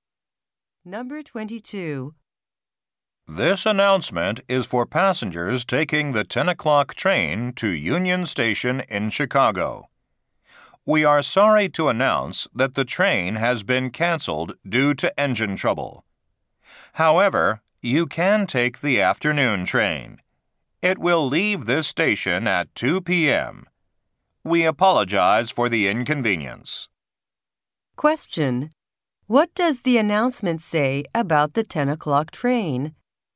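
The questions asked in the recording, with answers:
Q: What does the announcement say about the 10 o'clock train?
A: It has been canceled due to engine trouble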